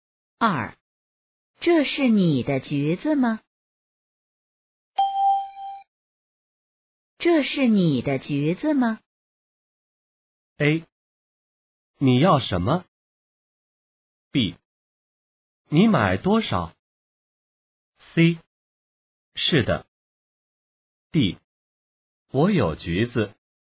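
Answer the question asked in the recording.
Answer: C: 是的。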